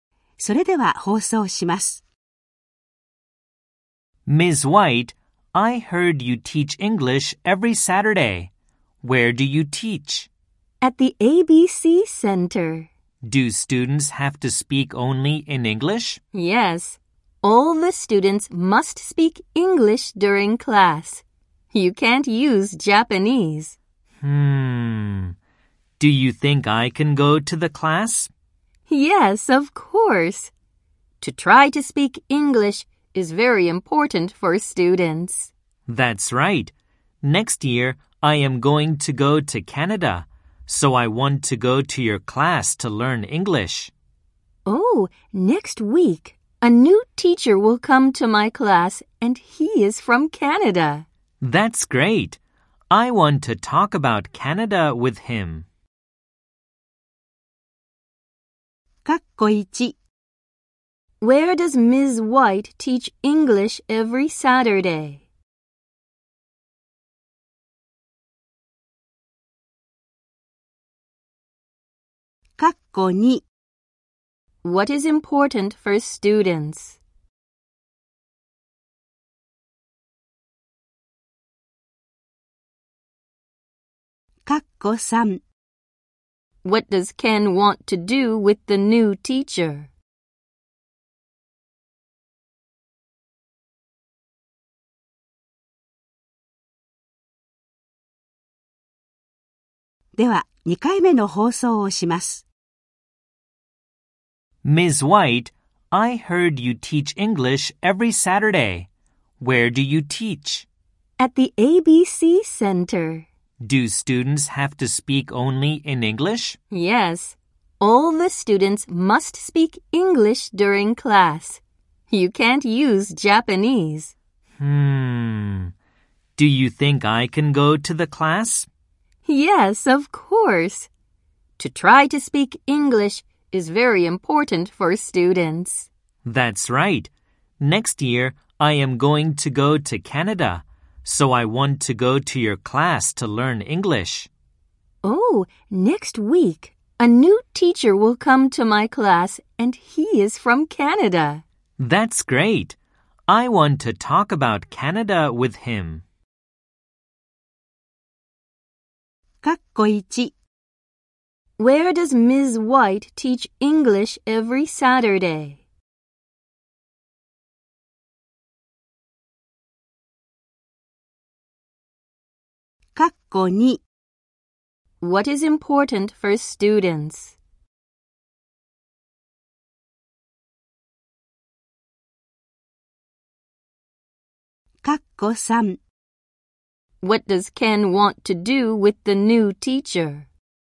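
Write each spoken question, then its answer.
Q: Where does Ms. White teach English every Saturday?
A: At the ABC Center.

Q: What is important for students?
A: To try to speak English.

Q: What does Ken want to do with the new teacher?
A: Talk about Canada with him.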